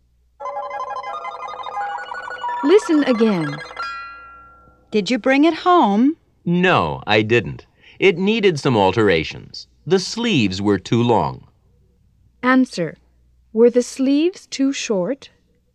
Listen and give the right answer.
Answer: No, they weren't.